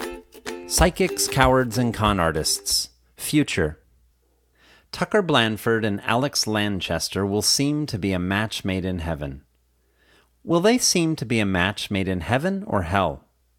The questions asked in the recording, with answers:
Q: Will they seem to be a match made in heaven or hell?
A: They will seem to be a match made in heaven.